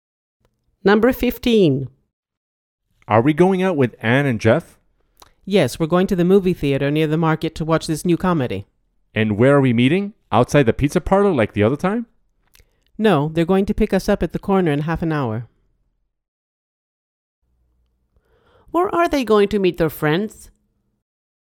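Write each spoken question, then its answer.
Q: Where are they going to meet their friends?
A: at the corner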